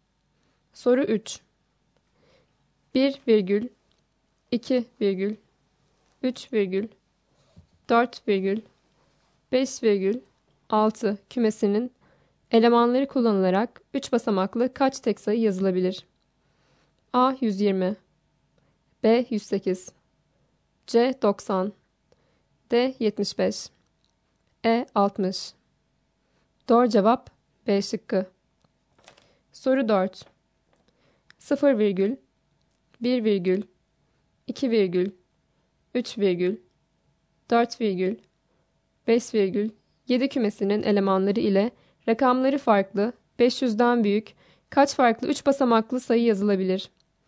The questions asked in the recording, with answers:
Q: 1 virgül 2 virgül 3 virgül 4 virgül 5 virgül 6 kümesinin elemanları kullanılarak 3 basamaklı kaç tek sayı yazılabilir?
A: Doğru cevap B şıkkı.